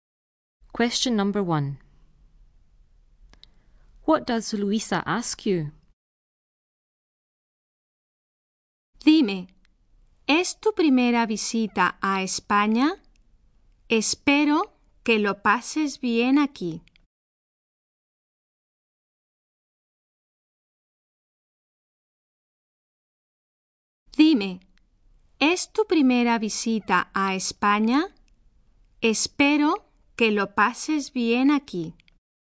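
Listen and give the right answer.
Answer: Whether it is your first visit to Spain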